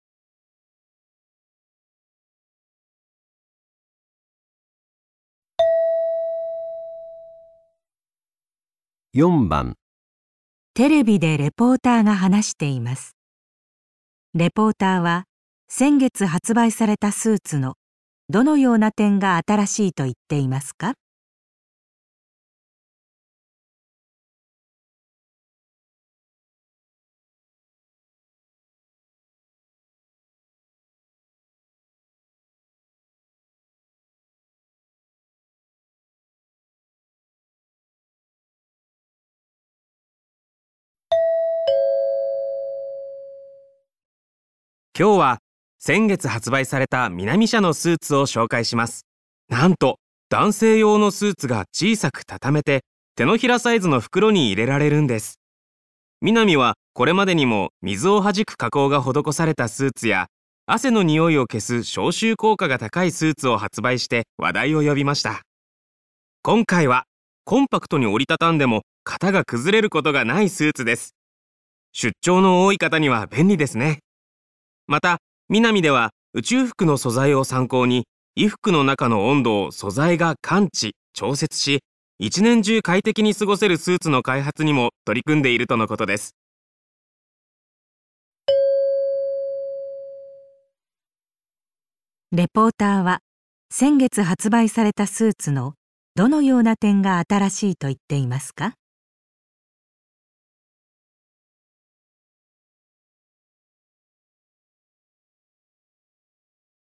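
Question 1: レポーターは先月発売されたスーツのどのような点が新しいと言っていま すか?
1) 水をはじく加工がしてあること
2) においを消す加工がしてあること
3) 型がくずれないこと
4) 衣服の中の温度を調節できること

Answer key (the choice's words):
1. 型がくずれないこと

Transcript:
今日は先月発売されたミナミ社のスーツを紹介します。 なんと、 男性用のスーツが小さく畳めて手のひらサイ ズの袋に入れられるんです。ミナミはこれまでにも水をはじく加工が施されたスーツや汗の匂いを消す消臭効 果が高いスーツを発売して話題を呼びました。今回はコンパクトに折りたたんでも、型が崩れることがないス ーツです。出張の多い方には便利ですね。 また、 ミナミでは宇宙服の素材を参考に衣服の中の温度を素材が 感知・調節し、一年中快適に過ごせるスーツの開発にも取り組んでいるとのことです。
問題:レポーターは先月発売されたスーツのどのような点が新しいと言っていますか?

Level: 【N1 第1回】聴解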